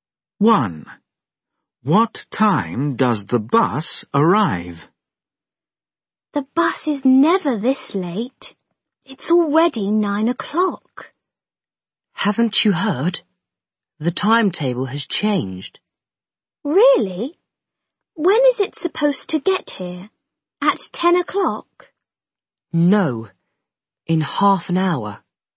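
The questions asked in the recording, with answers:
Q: What time does the bus arrive?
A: 9:30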